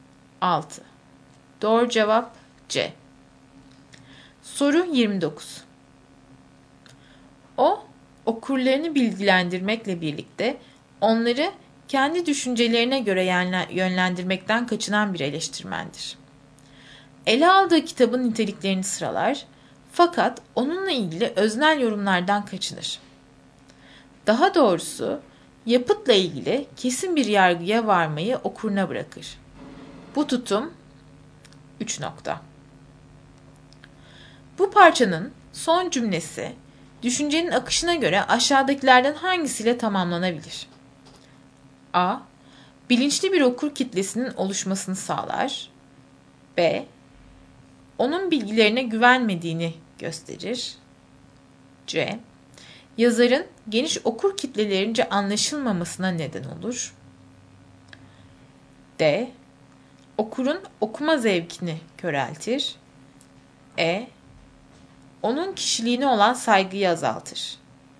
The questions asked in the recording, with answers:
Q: Bu parçanın son cümlesi, düşüncenin akışına göre aşağıdakilerden hangisiyle tamamlanabilir?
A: Doğru cevap A.